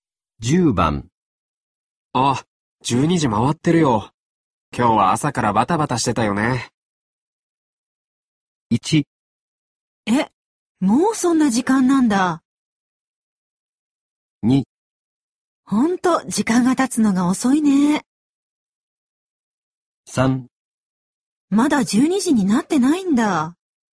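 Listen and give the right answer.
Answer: 1: え、もうそんな時間なんだ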